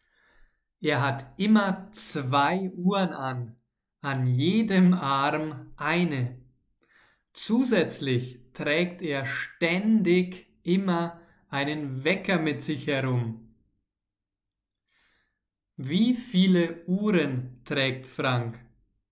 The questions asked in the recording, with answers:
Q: Wie viele Uhren trägt Frank?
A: Zwei. Frank trägt immer zwei Uhren.